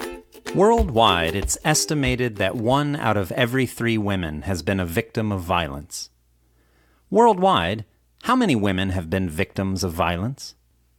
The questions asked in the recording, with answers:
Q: Worldwide, how many women have been victims of violence?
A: Worldwide, one out of every three women has been a victim of violence.